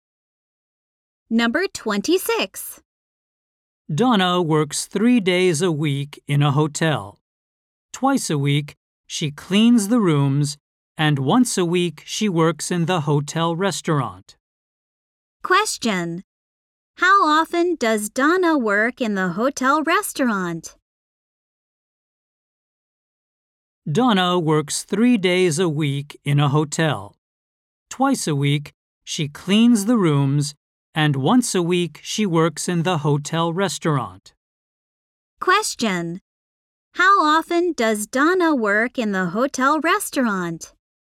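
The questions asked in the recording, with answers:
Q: How often does Donna work in the hotel restaurant?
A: Once a week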